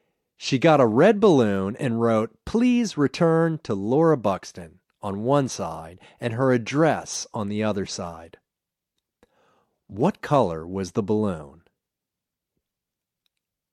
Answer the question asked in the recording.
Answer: It was a red balloon.